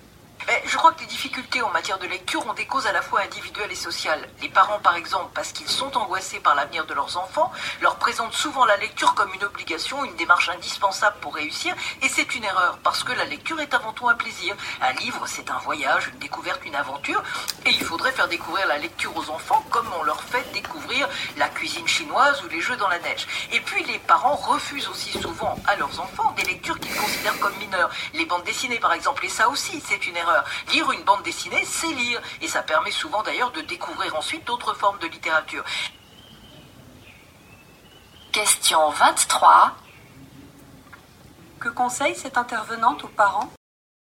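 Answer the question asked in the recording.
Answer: Présenter la lecture comme un plaisir et accepter les bandes dessinées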